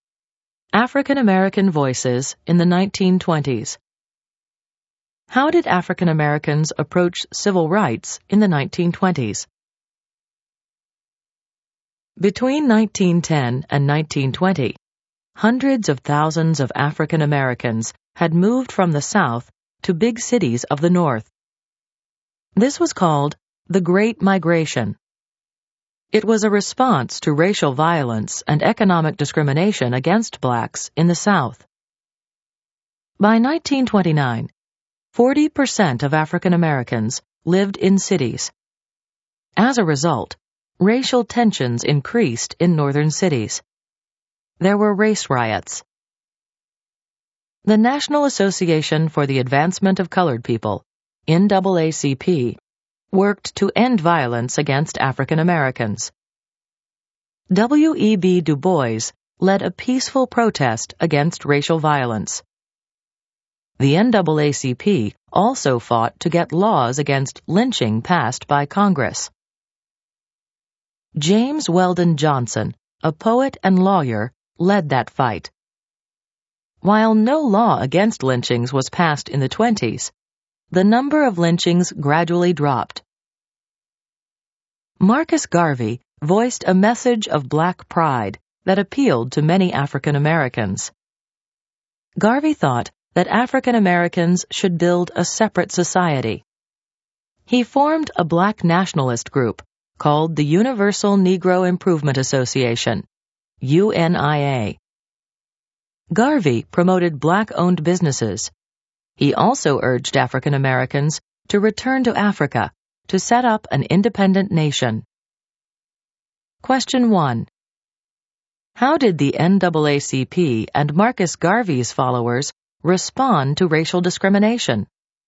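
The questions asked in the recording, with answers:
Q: How did the NAACP and Marcus Garvey's followers respond to racial discrimination?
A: The NAACP used peaceful protest and pushed for anti-lynching laws; Garvey's followers promoted black pride, a separate black society, black-owned businesses and a return to Africa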